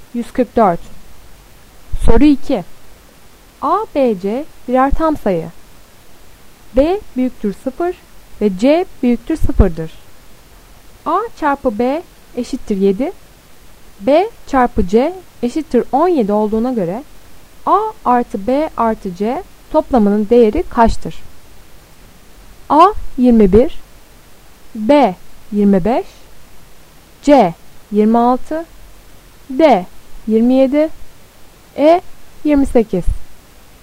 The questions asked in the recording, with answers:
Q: A çarpı B eşittir 7. B çarpı C eşittir 17 olduğuna göre A artı B artı C toplamının değeri kaçtır?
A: Doğru cevap B 25.